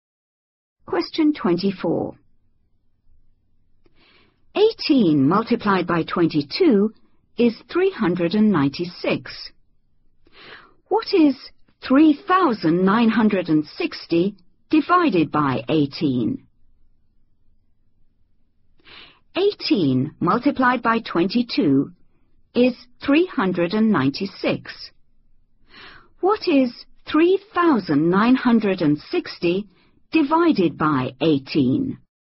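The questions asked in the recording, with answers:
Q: What is 3,960 divided by 18?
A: 220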